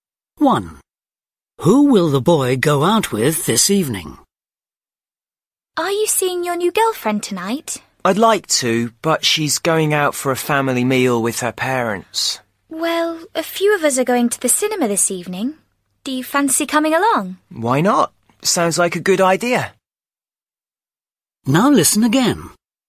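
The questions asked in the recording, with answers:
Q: Who will the boy go out with this evening?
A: a few friends (to the cinema)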